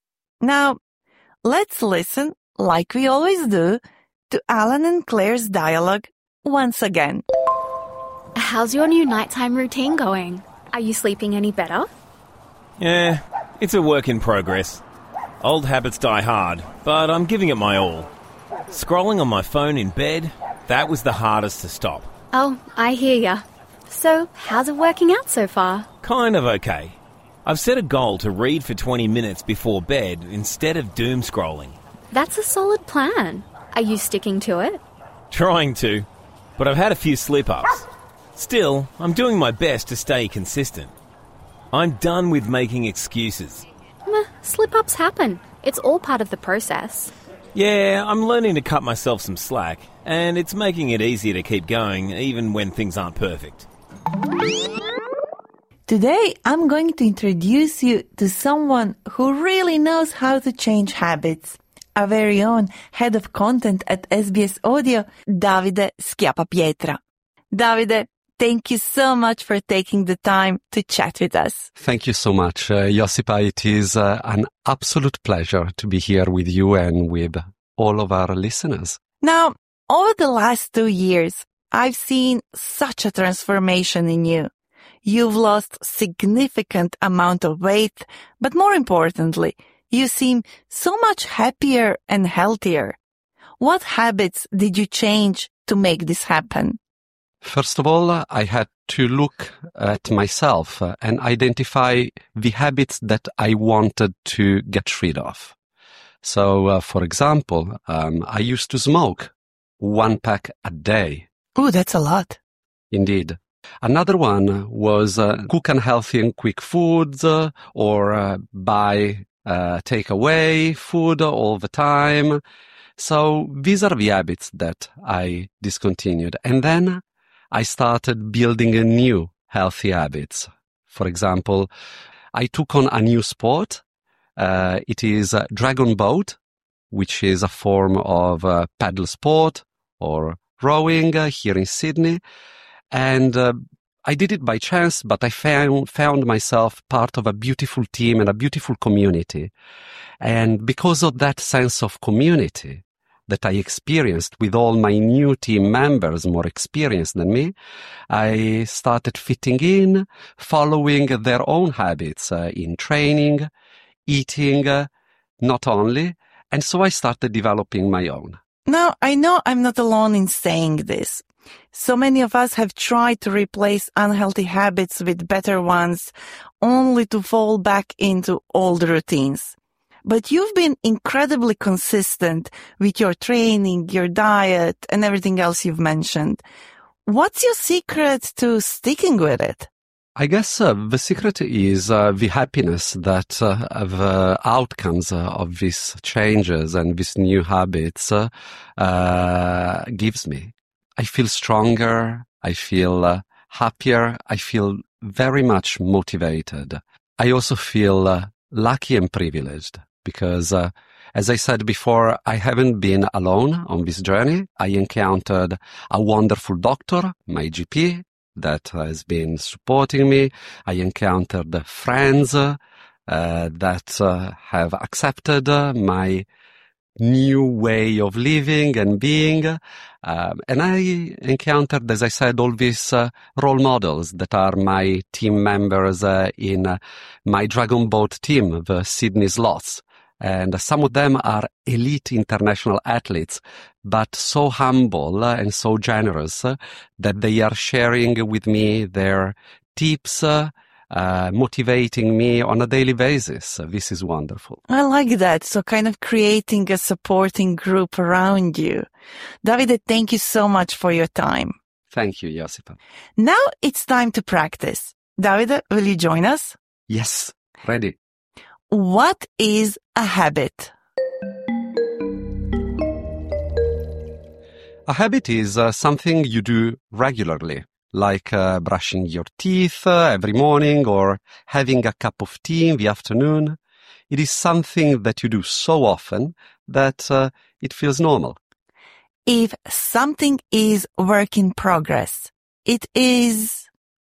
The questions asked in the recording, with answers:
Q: What is a habit?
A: A habit is something you do regularly, like brushing your teeth every morning or having a cup of tea in the afternoon.